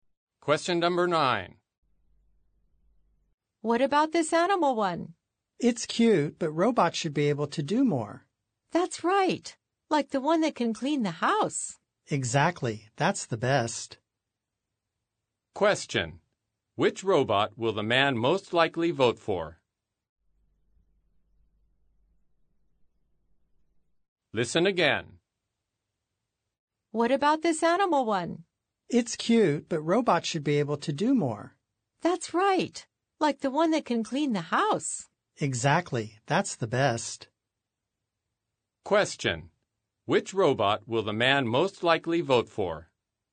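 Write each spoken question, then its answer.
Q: Which robot will the man most likely vote for?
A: The robot that can clean the house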